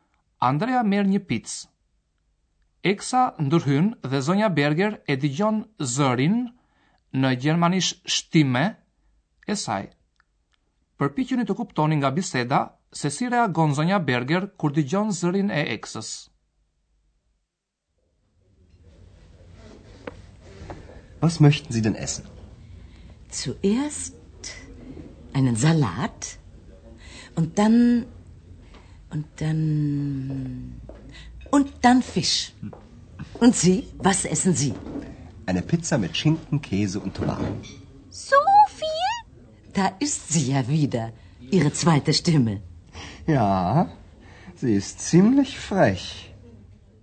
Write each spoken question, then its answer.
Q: Përpikjën të kuptoni nga biseda se si reagon Zonja Berger kur digjon zërin e eksës.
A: Zonja Berger zbavitet mjaft nga zëri i dyt i Andreas, siç e quan ajo.